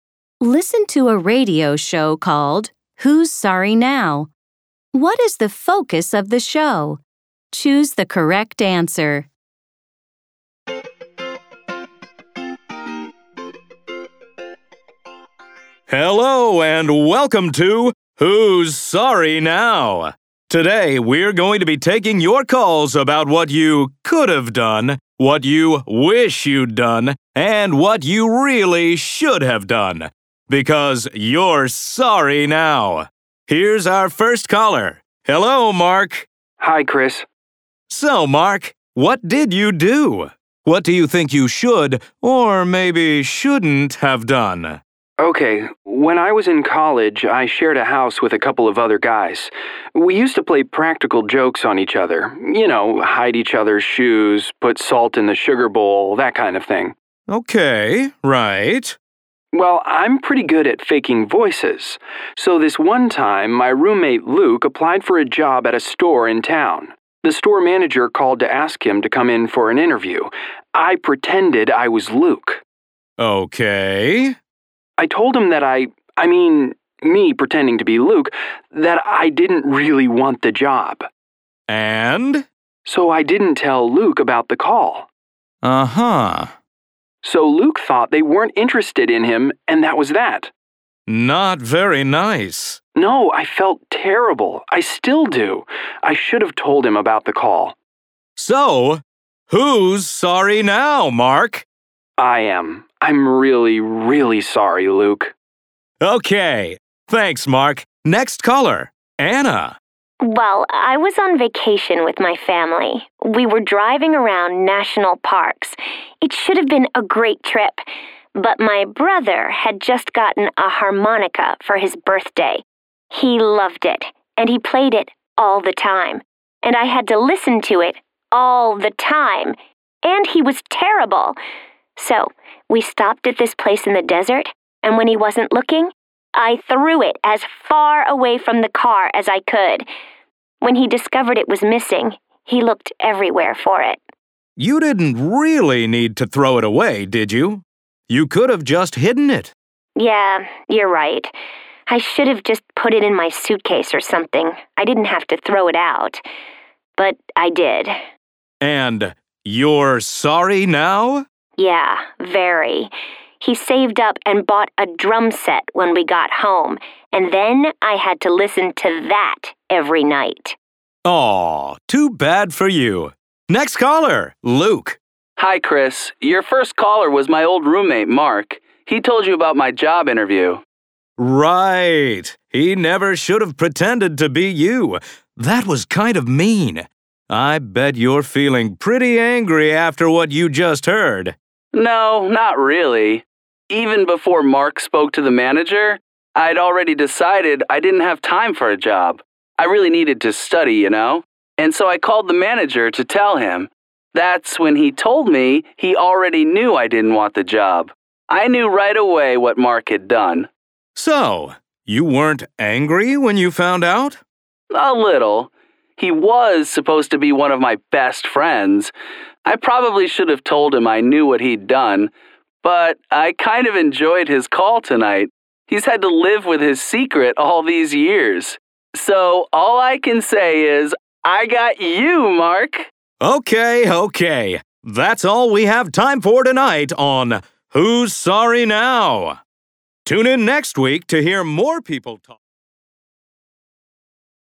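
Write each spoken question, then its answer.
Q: What is the focus of the show?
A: Callers talk about things they regret doing and wish they had done differently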